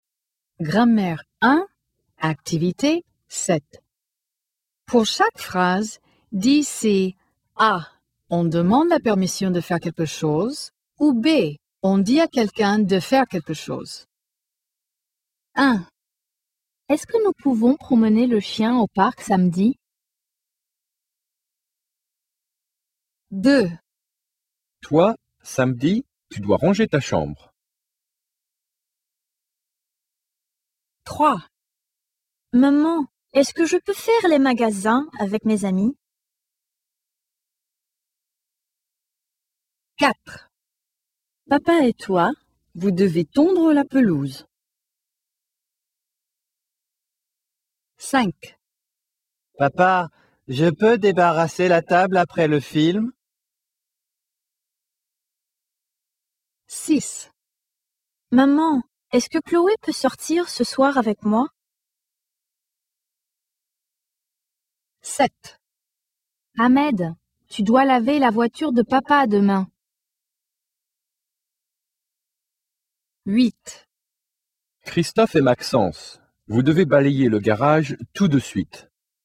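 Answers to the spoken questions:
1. A: on demande la permission de faire quelque chose
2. B: on dit à quelqu'un de faire quelque chose
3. A: on demande la permission de faire quelque chose
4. B: on dit à quelqu'un de faire quelque chose
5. A: on demande la permission de faire quelque chose
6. A: on demande la permission de faire quelque chose
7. B: on dit à quelqu'un de faire quelque chose
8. B: on dit à quelqu'un de faire quelque chose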